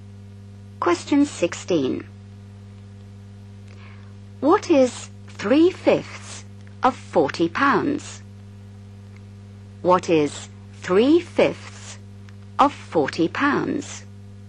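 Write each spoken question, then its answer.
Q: What is 3/5 of 40 pounds?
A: £24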